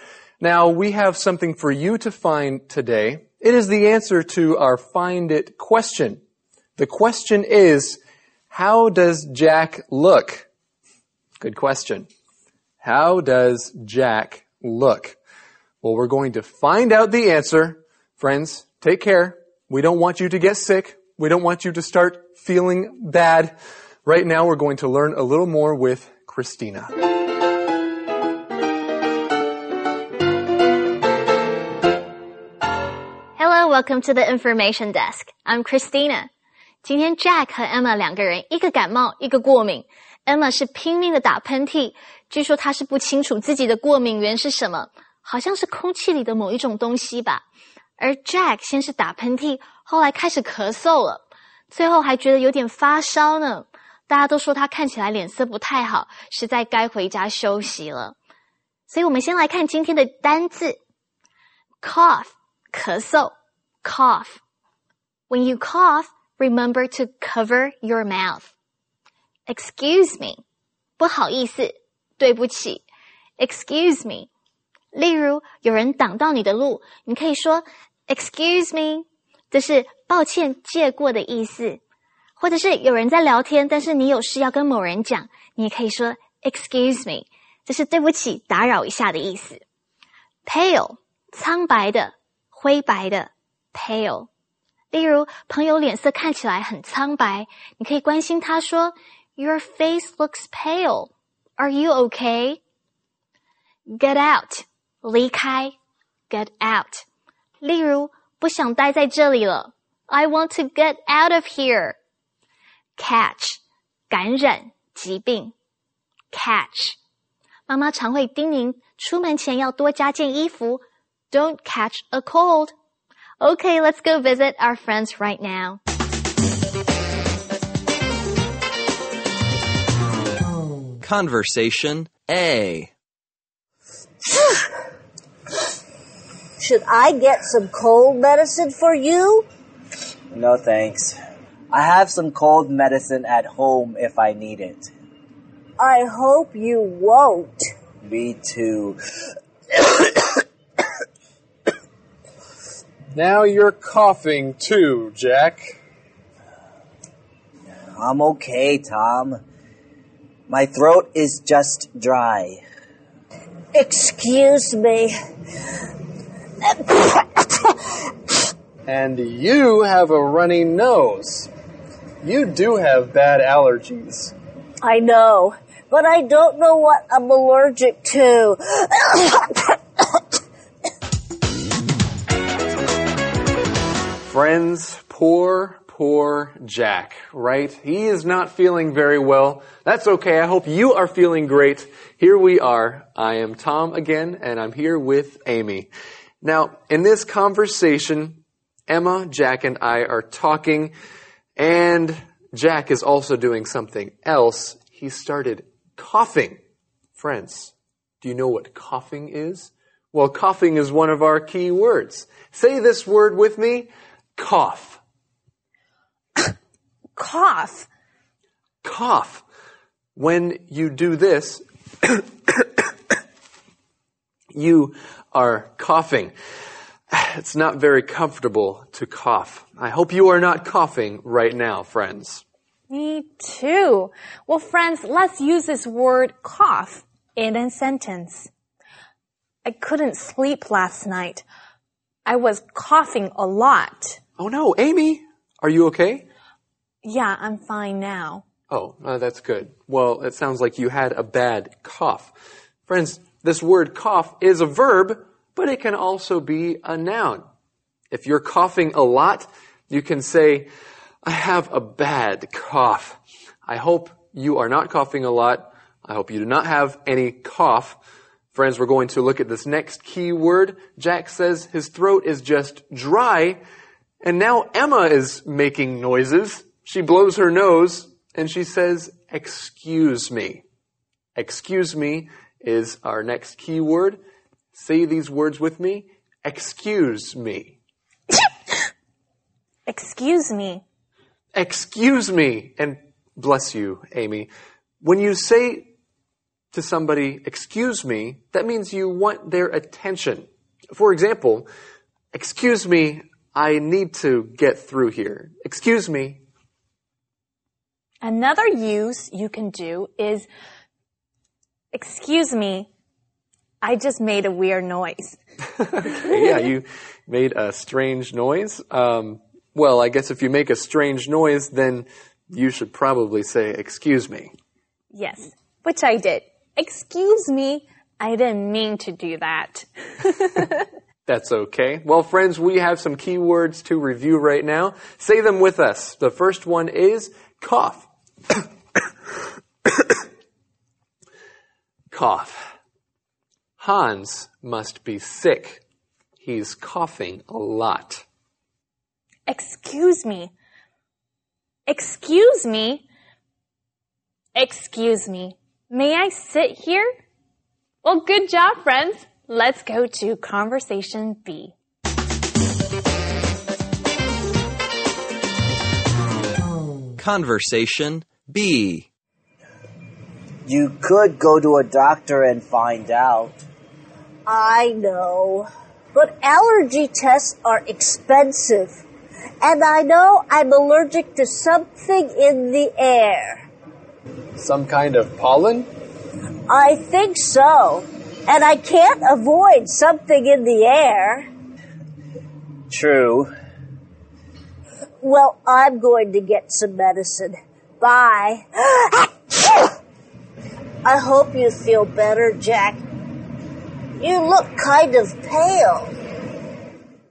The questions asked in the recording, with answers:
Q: The question is, how does Jack look?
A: How does Jack look? Jack looks kind of pale.